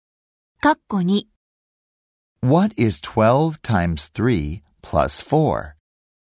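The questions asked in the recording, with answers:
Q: What is 12 times 3 plus 4?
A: 40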